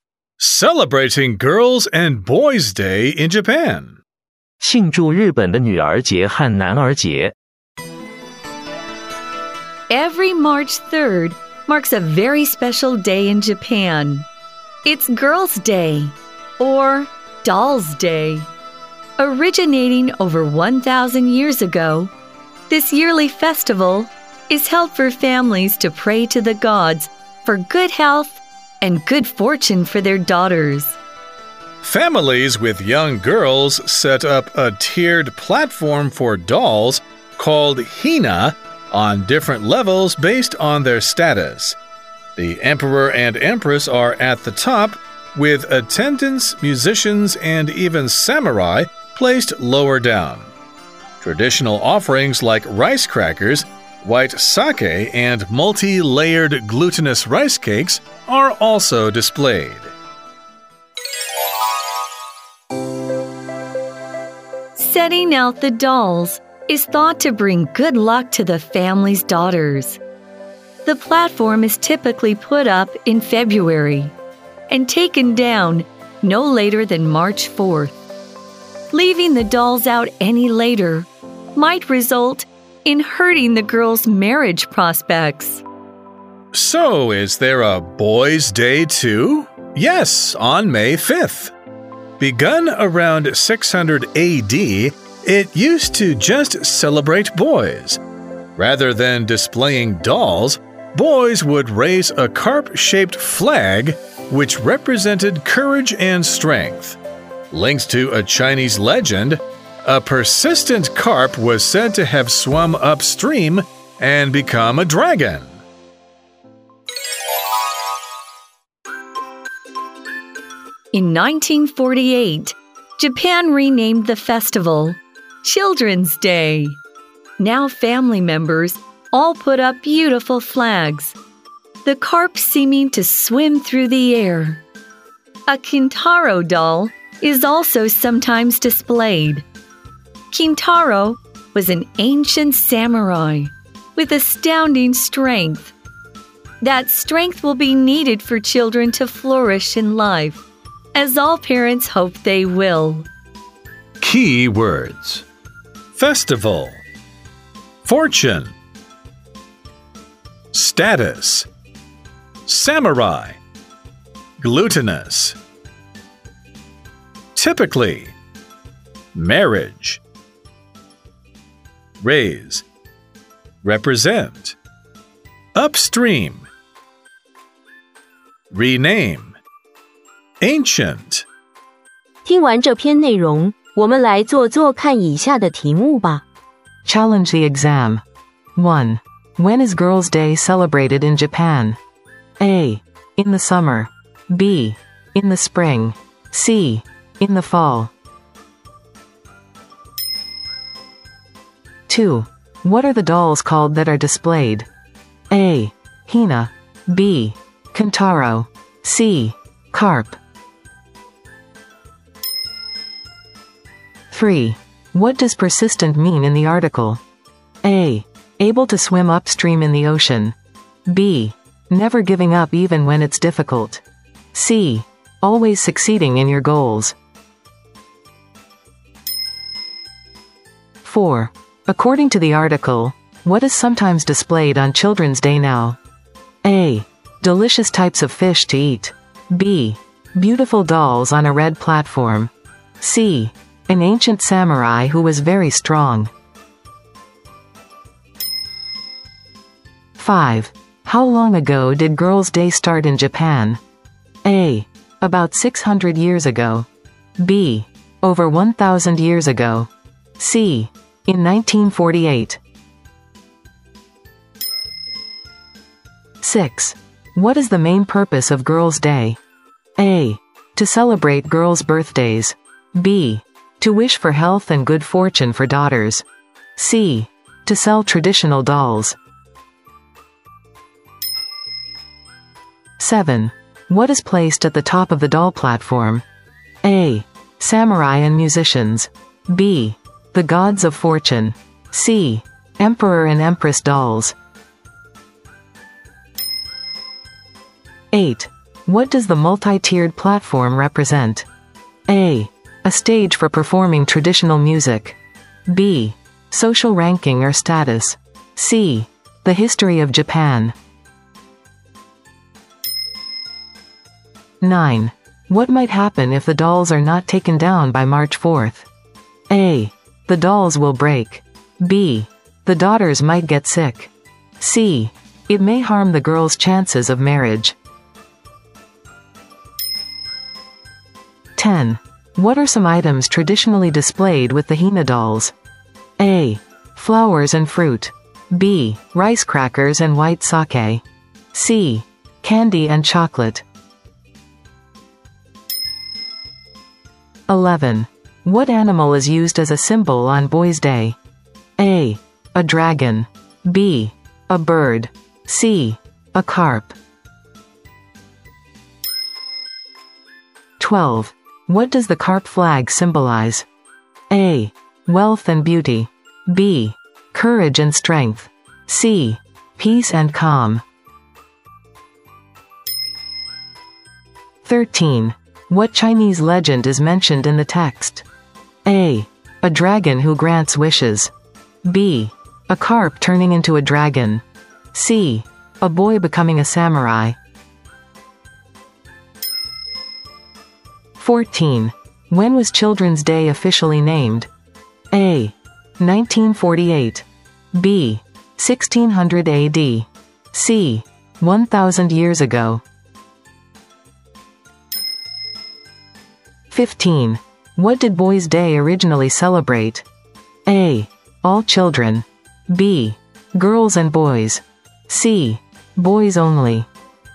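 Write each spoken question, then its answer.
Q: When is Girls' Day celebrated in Japan?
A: B: In the spring.

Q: What are the dolls called that are displayed?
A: A: Hina.

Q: What does persistent mean in the article?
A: B: Never giving up even when it's difficult.

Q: How long ago did Girls' Day start in Japan?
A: B: Over 1,000 years ago.

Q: What is the main purpose of Girls' Day?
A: B: To wish for health and good fortune for daughters.

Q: What is placed at the top of the doll platform?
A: C: Emperor and empress dolls.

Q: What does the multi-tiered platform represent?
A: B: Social ranking or status.

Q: What might happen if the dolls are not taken down by March 4th?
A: C: It may harm the girls' chances of marriage.

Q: What are some items traditionally displayed with the Hina dolls?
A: B: Rice crackers and white sake.

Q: What animal is used as a symbol on Boys' Day?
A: C: A carp.

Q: What does the carp flag symbolize?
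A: B: Courage and strength.

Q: What Chinese legend is mentioned in the text?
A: B: A carp turning into a dragon.

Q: When was Children's Day officially named?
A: A: 1948.

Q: What did Boys' Day originally celebrate?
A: C: Boys only.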